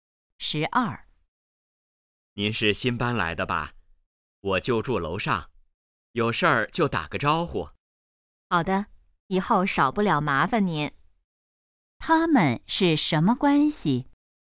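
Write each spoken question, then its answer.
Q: 他们是什么关系?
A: 邻居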